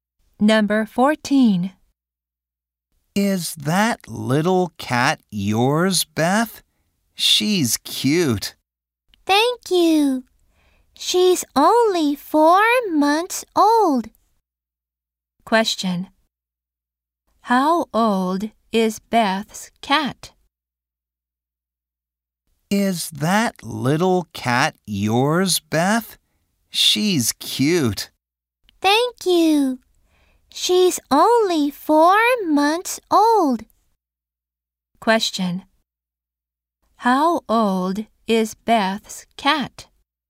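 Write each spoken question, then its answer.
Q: How old is Beth's cat?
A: 4 months old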